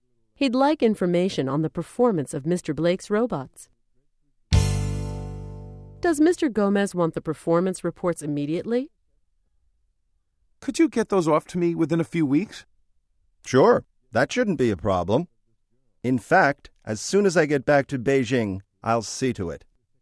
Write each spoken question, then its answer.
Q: Does Mr. Gomez want the performance reports immediately?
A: No, he doesn't. He is willing to wait for a few weeks.